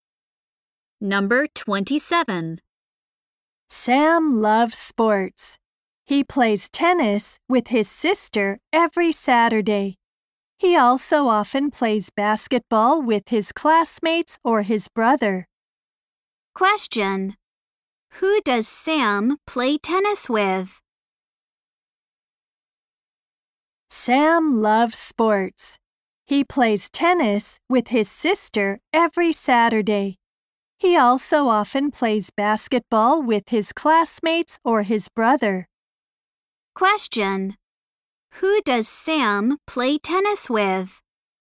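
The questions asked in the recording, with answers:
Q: Who does Sam play tennis with?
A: His sister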